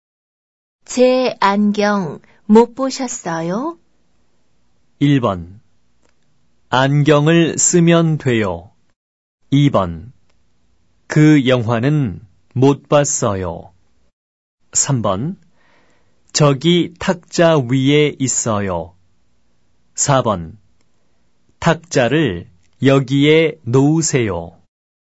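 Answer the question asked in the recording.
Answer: 3: 저기 탁자 위에 있어요.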